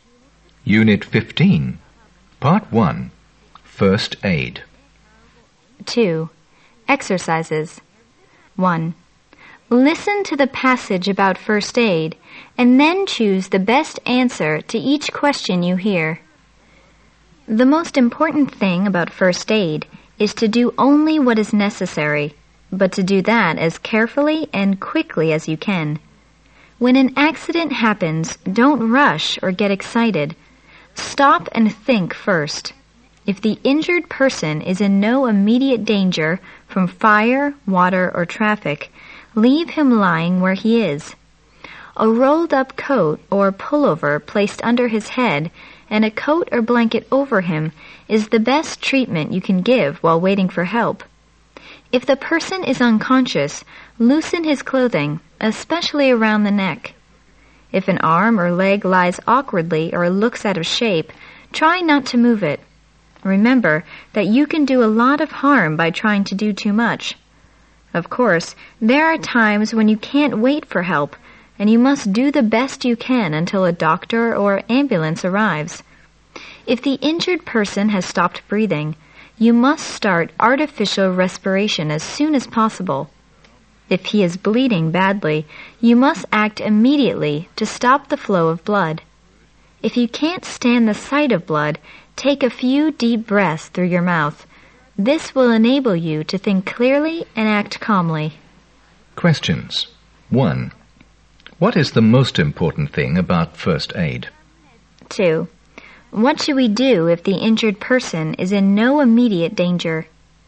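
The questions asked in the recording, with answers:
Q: What is the most important thing about first aid?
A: Do only what is necessary, as carefully and quickly as you can

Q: What should we do if the injured person is in no immediate danger?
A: Leave him lying where he is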